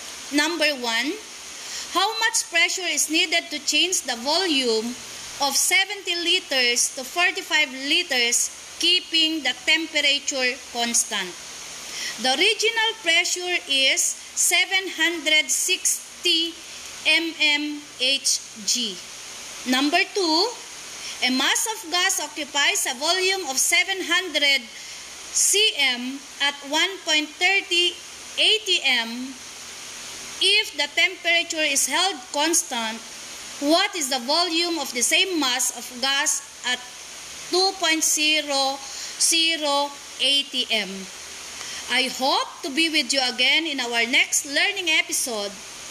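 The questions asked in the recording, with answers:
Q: How much pressure is needed to change the volume of 70 liters to 45 liters, keeping the temperature constant?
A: about 1182 mmHg

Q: If the temperature is held constant, what is the volume of the same mass of gas at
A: 455 cm3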